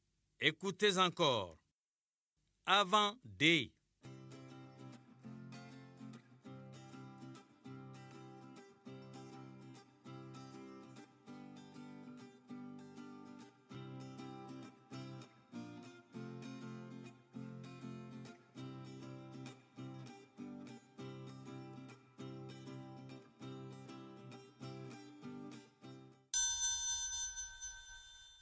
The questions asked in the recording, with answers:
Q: Avant D.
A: Bravo les élèves, j'espère que vous avez trouvé la lettre C.